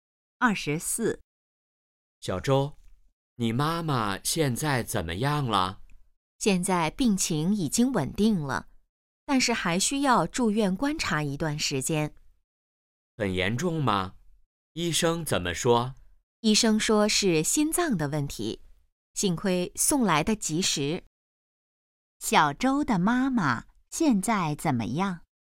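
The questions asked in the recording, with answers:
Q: 小周的妈妈现在怎么样?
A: 病情稳定了,但还需住院观察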